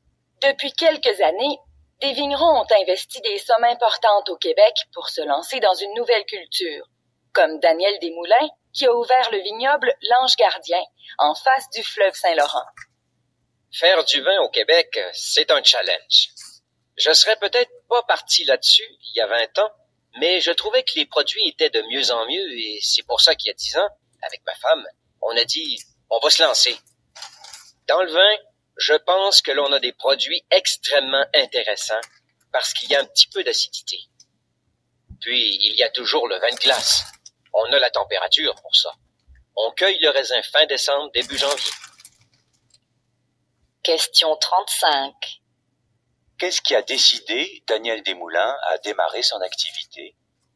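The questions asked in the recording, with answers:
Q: Qu'est-ce qui a décidé Daniel Desmoulins à démarrer son activité?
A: L'amélioration de la qualité des vins québécois (les produits étaient de mieux en mieux).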